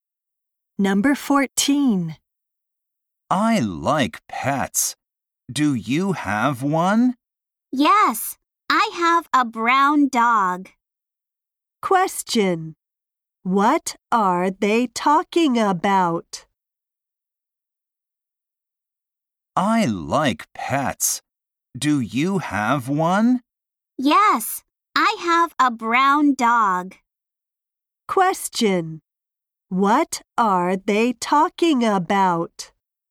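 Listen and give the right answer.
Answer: Pets (a dog)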